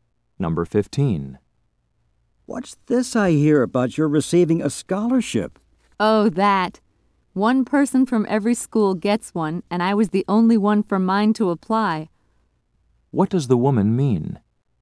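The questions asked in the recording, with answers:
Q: What does the woman mean?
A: She got the scholarship because she was the only applicant.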